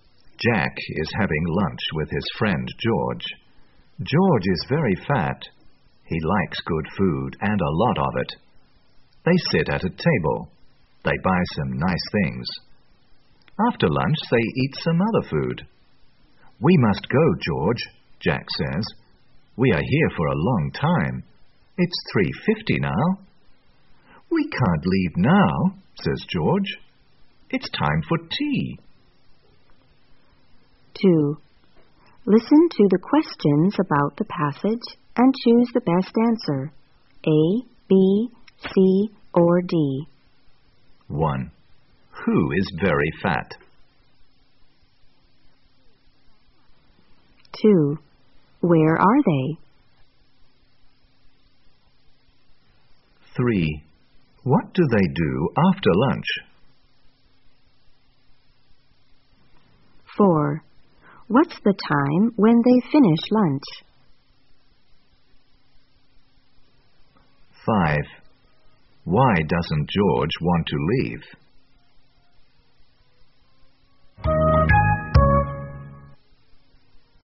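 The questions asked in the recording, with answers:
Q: Who is very fat?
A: George

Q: What do they do after lunch?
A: They eat some other food

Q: What's the time when they finish lunch?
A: 3:50

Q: Why doesn't George want to leave?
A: Because it's time for tea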